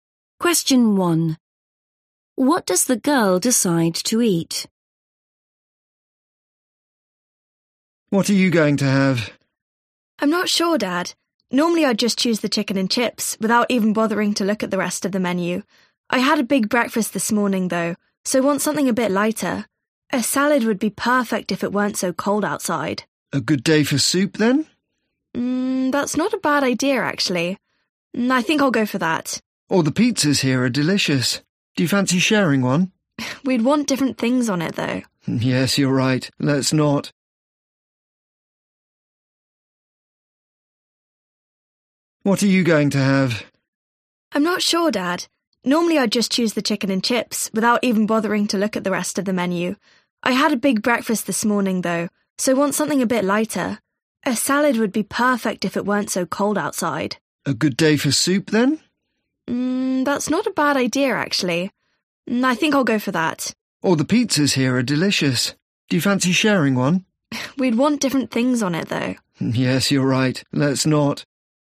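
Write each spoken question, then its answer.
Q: What does the girl decide to eat?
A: soup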